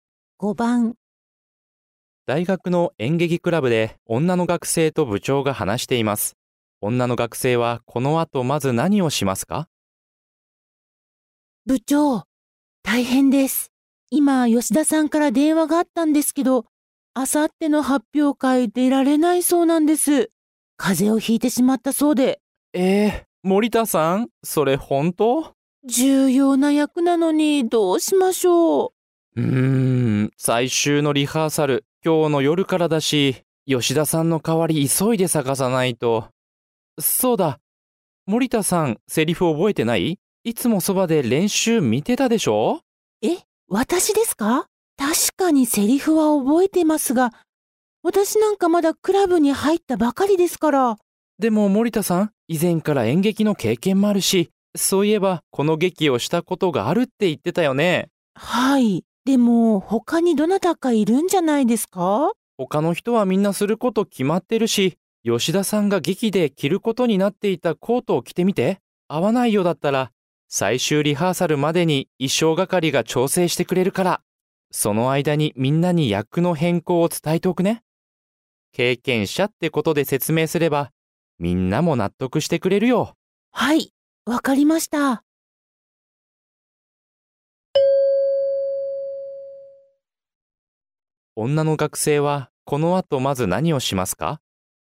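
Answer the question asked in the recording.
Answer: 吉田さんが着る予定だったコートを着てみる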